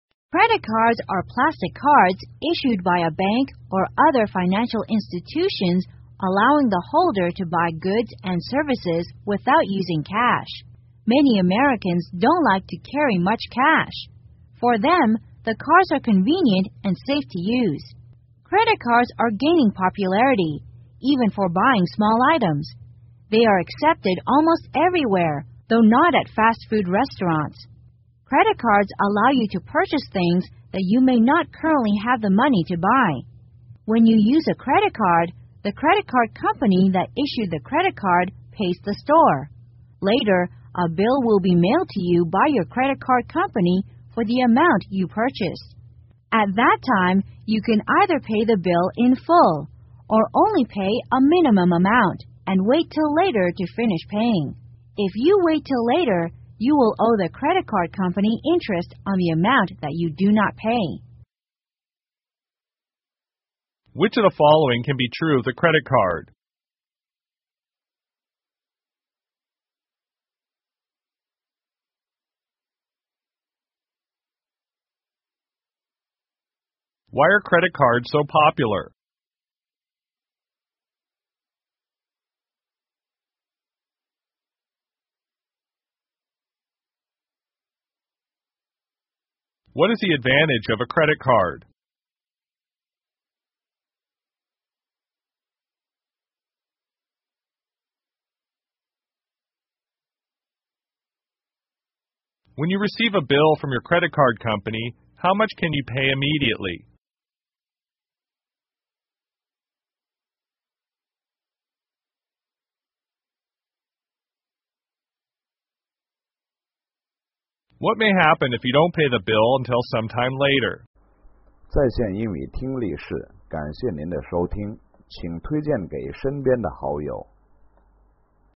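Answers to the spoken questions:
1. They are convenient and safe to use, and many Americans don't like to carry much cash.
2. It lets you buy things you may not currently have the money for.
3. Either the full amount or only a minimum amount.
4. You will owe the credit card company interest on the unpaid amount.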